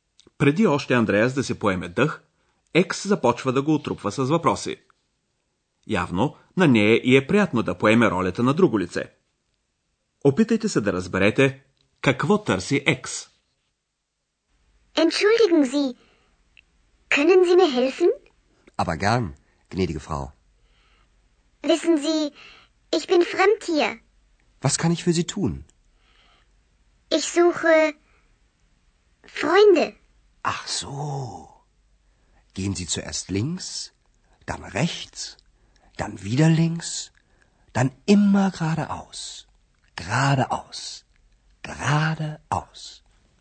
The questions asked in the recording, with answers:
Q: Опитайте се да разберете какво търси Екс.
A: Екс заявява, че търси приятели.